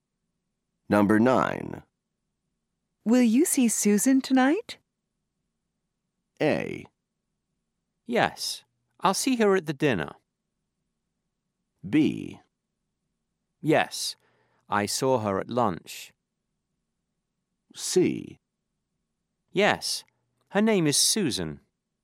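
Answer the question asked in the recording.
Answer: A: Yes, I'll see her at the dinner.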